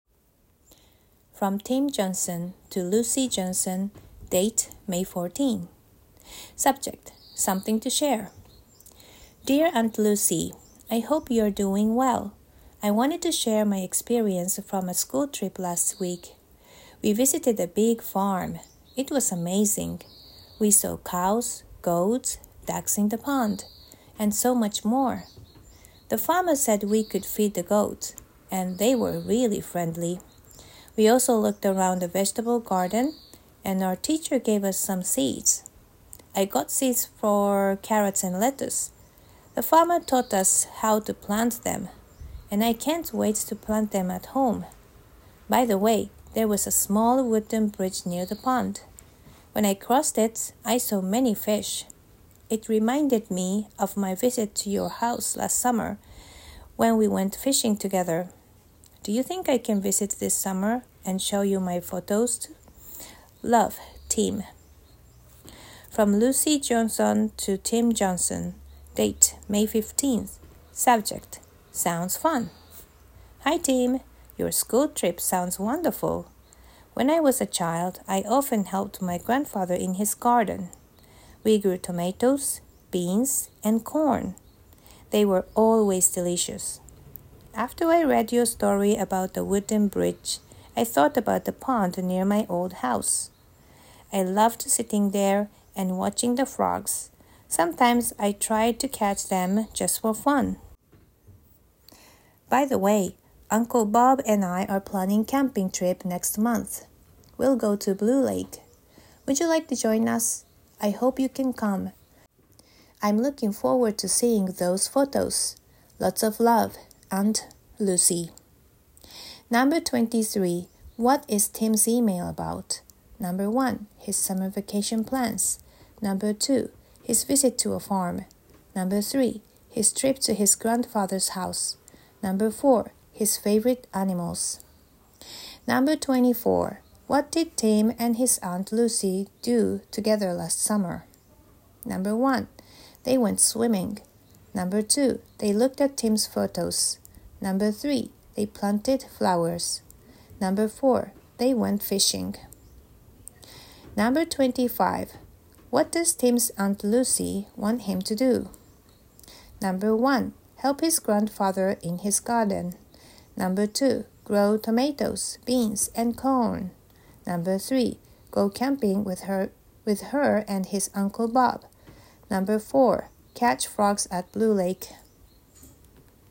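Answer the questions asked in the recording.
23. 2: His visit to a farm.
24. 4: They went fishing.
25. 3: Go camping with her and his Uncle Bob.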